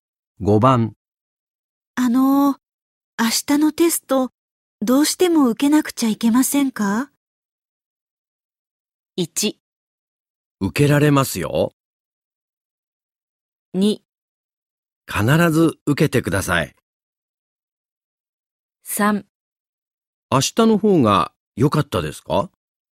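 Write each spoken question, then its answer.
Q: 明日のテスト、どうしても受けなくちゃいけませんか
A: 2: 必ず受けてください。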